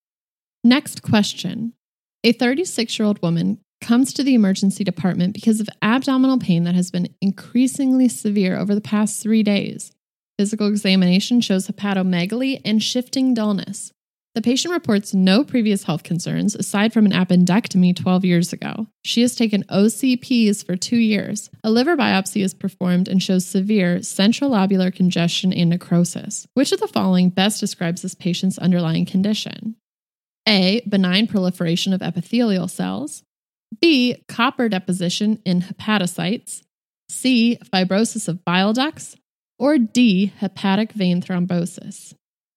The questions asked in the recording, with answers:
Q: Which of the following best describes this patient's underlying condition?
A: And the correct answer is D.